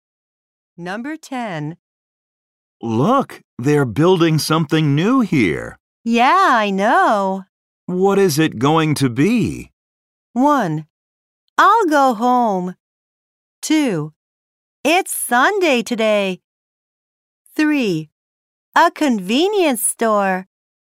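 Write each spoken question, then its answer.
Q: What is it going to be?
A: 3: A convenience store.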